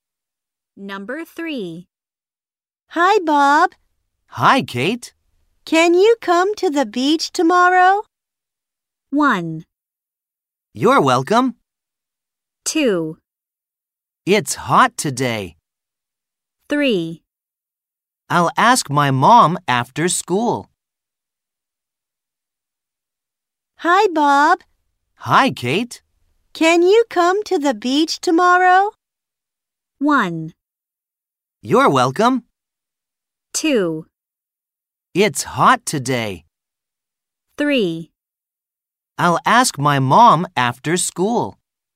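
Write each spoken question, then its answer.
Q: Can you come to the beach tomorrow?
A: 3: I'll ask my mom after school.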